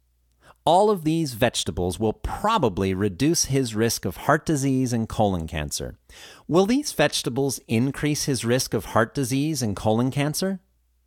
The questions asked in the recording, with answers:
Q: Will these vegetables increase his risk of heart disease and colon cancer?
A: No, these vegetables will probably reduce his risk of heart disease and colon cancer.